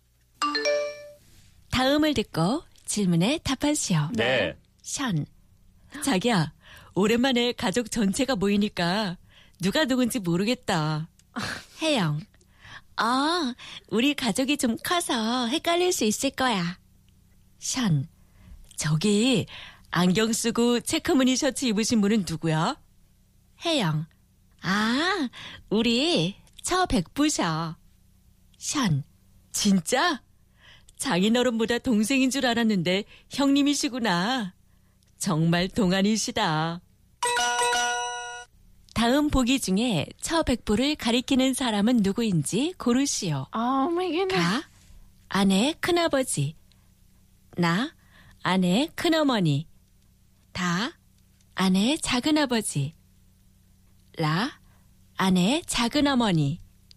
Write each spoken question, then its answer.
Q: 다음 보기 중에 처 백부를 가리키는 사람은 누구인지 고르시오.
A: The answer was 가, 아내, 큰 아버지, wife's father's older brother.